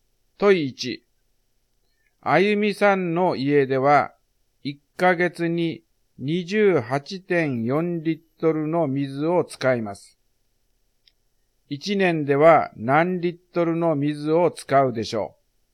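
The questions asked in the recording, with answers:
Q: 1年では何リットルの水を使うでしょう。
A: 340.8リットル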